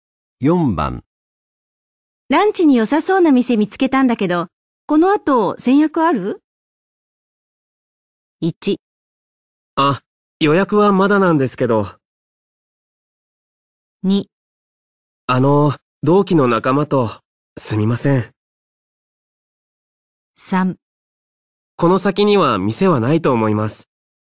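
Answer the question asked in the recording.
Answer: 2: あの、同期の仲間と、すみません。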